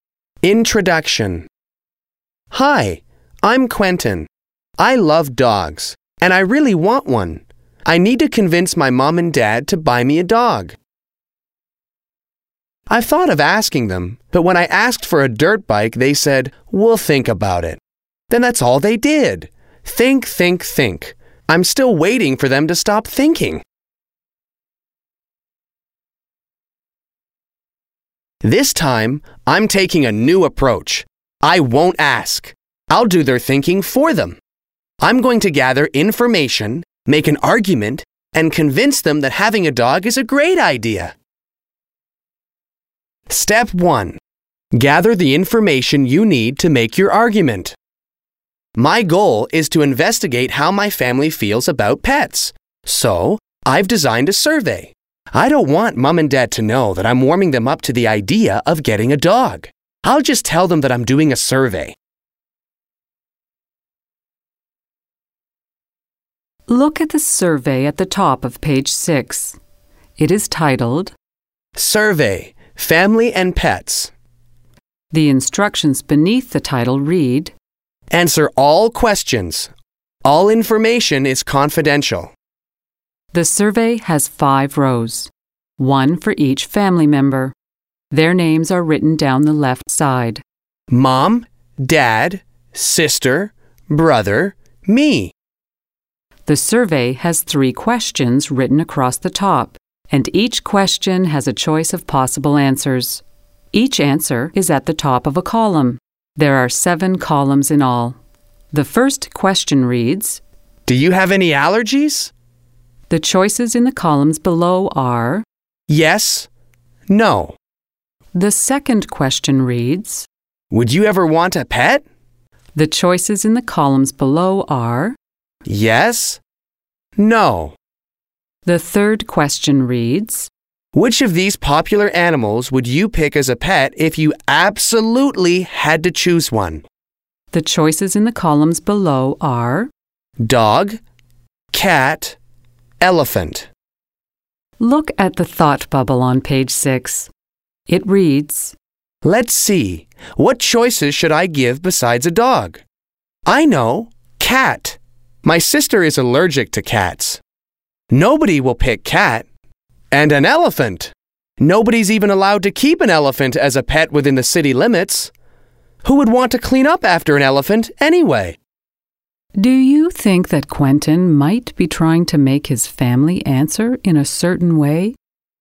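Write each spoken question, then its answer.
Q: Do you think that Quentin might be trying to make his family answer in a certain way?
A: Yes, he chose answer options (cat, elephant) so that nobody would pick anything but dog.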